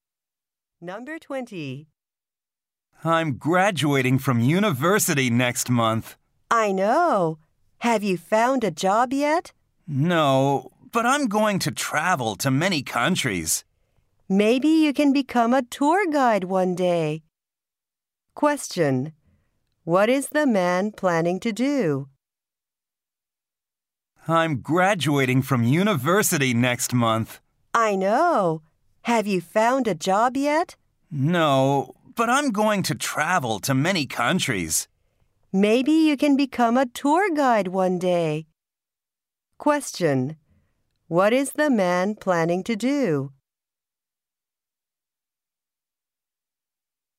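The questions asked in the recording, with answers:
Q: What is the man planning to do?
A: Travel to many countries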